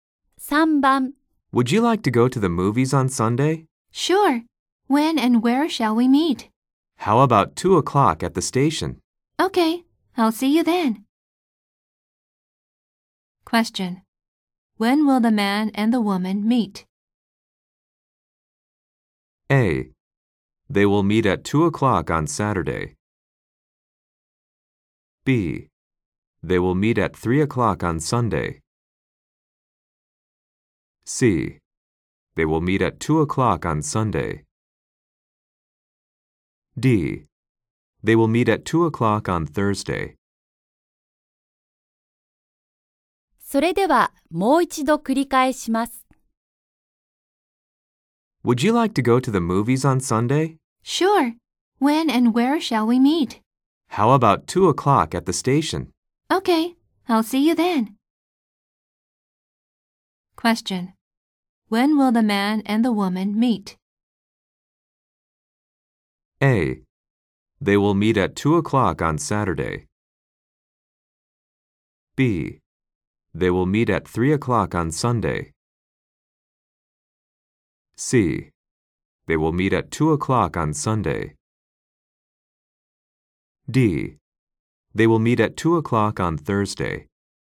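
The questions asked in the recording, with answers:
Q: When will the man and the woman meet?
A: C: They will meet at 2:00 on Sunday.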